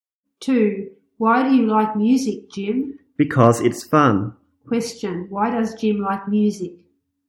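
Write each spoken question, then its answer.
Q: Why does Jim like music?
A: Because it's fun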